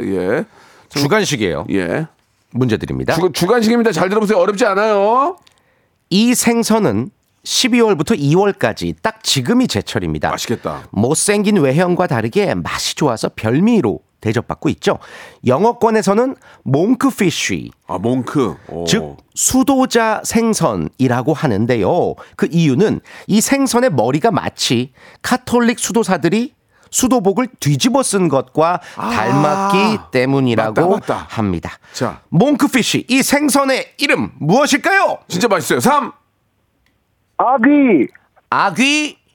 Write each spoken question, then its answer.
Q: 자, 몽크피쉬 이 생선의 이름 무엇일까요?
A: 정답! 정답!